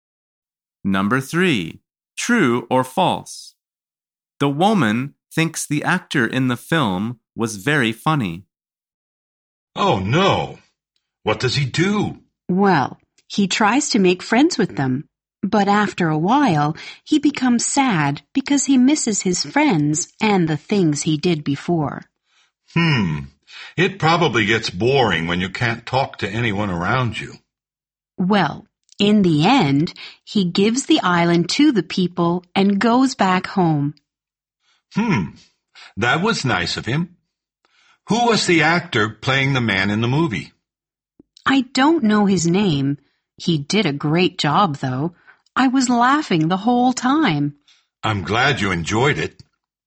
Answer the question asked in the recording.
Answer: The answer is true. She says, he did a great job.